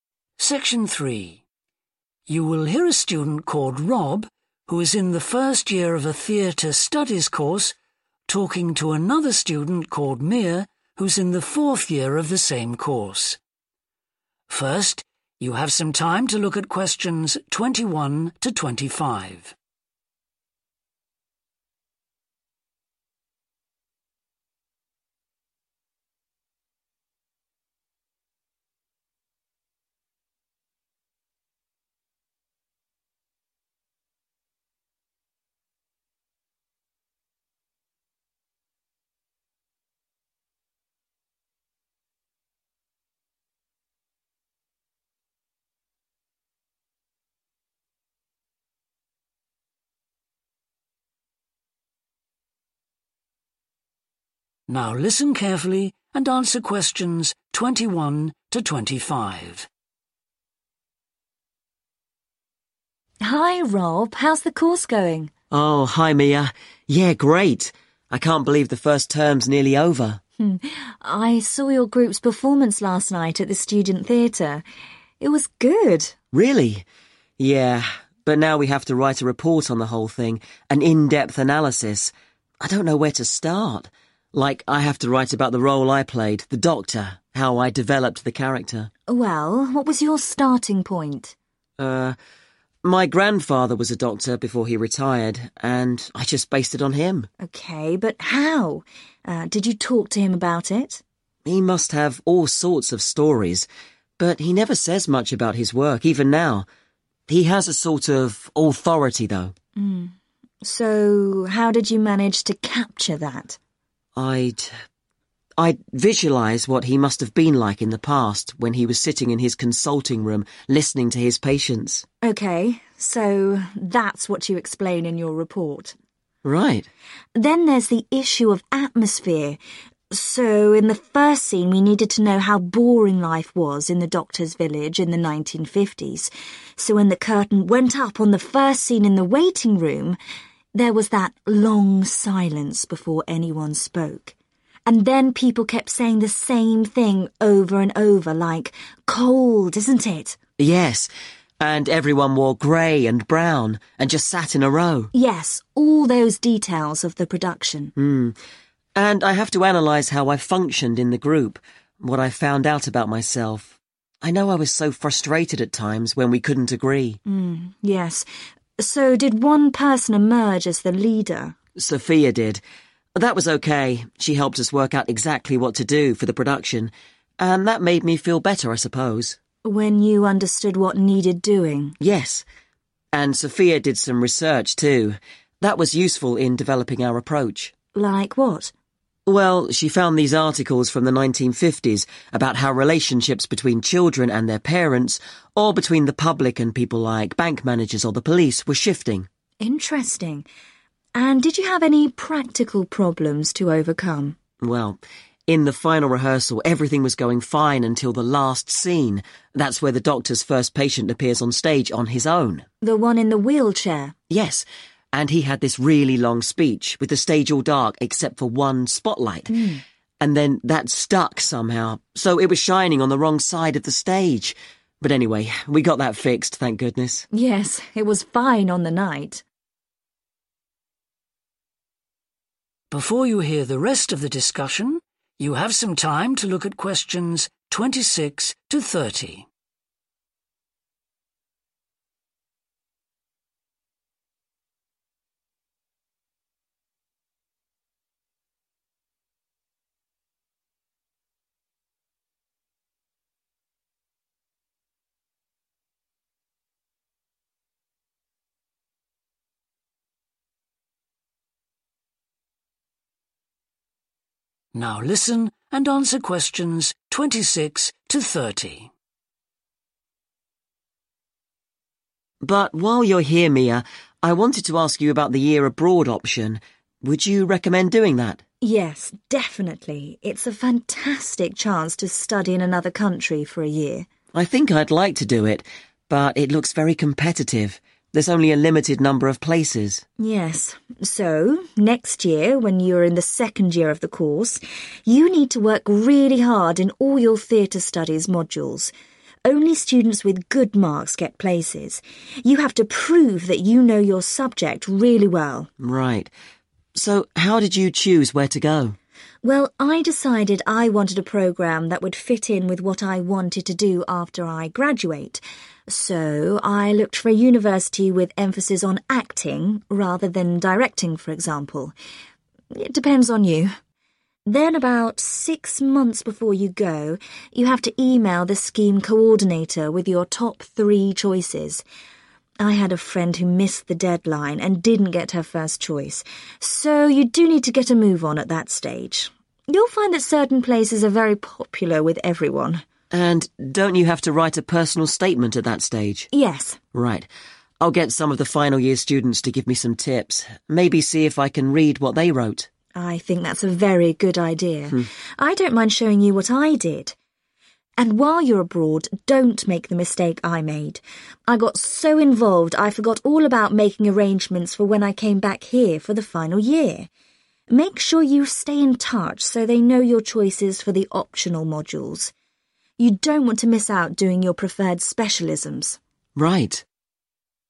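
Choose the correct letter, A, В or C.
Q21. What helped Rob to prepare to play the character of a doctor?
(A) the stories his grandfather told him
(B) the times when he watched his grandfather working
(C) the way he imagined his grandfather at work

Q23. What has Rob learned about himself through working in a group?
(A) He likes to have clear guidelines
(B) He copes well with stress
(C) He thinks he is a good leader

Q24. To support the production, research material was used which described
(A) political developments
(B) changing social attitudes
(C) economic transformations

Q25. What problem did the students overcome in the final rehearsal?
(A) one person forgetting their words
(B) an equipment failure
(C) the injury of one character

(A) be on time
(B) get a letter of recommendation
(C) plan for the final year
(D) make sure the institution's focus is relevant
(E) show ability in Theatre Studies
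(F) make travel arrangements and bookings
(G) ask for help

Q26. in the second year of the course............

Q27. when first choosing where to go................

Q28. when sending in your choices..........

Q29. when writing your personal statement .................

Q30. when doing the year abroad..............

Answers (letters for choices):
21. C
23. A
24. B
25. B
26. E
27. D
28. A
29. G
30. C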